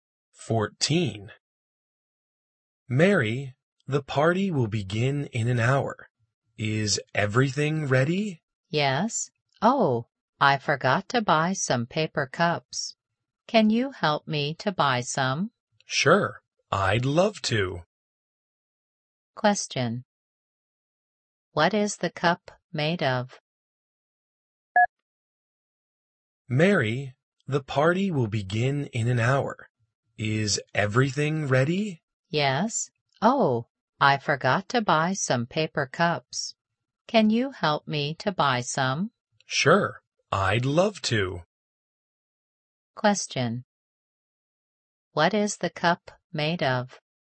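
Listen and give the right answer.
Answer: Paper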